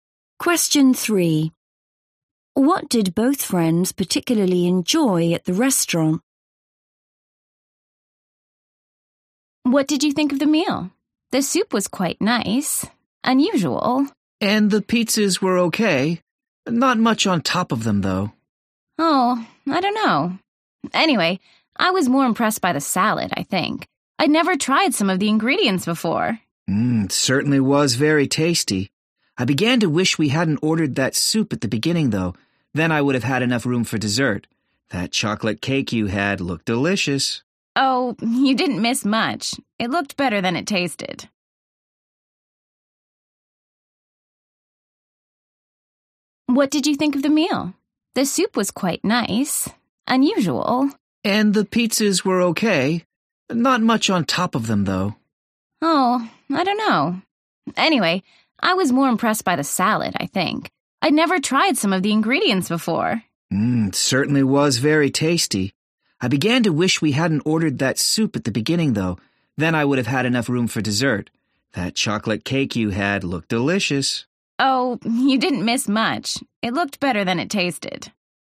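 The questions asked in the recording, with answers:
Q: What did both friends particularly enjoy at the restaurant?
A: the salad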